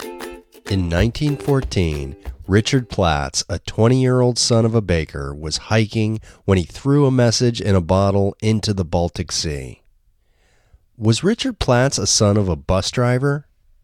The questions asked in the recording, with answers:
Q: Was Richard Platts a son of a bus driver?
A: No, Richard Platts wasn't the son of a bus driver.